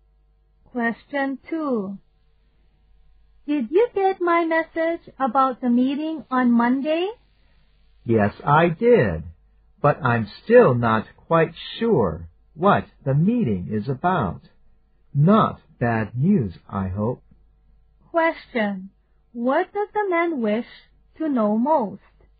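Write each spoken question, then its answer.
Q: What does the man wish to know most?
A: What the meeting is about.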